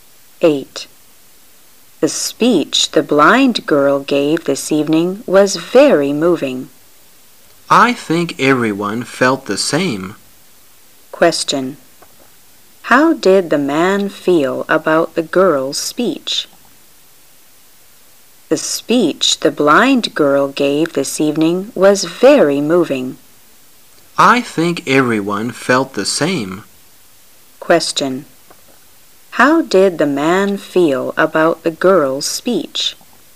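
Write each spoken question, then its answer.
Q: How did the man feel about the girl's speech?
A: He found it very moving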